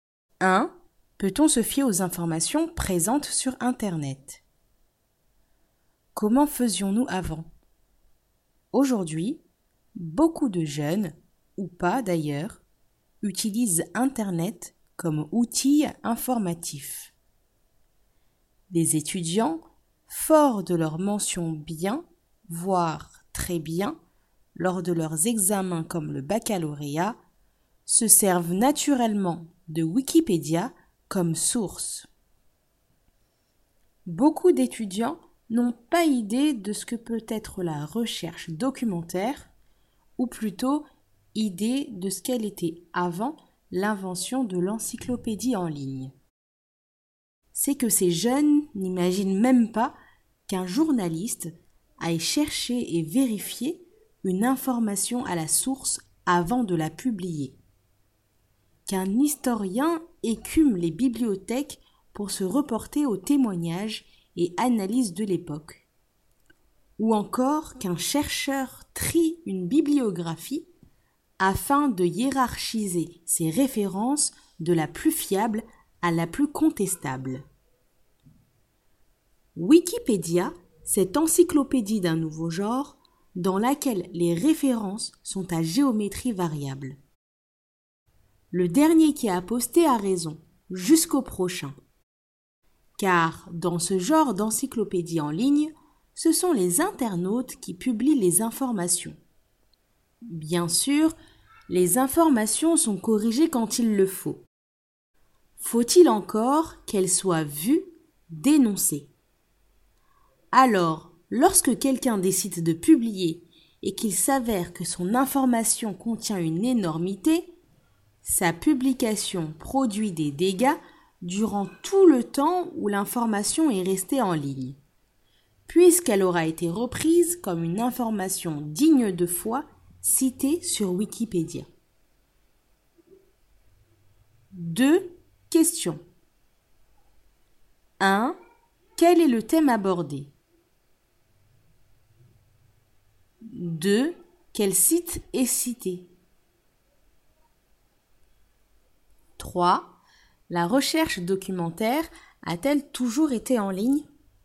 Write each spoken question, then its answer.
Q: Quel est le thème abordé?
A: Les informations sur Internet.

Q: Quel site est cité?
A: Wikipédia.

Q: La recherche documentaire a-t-elle toujours été en ligne?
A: Non.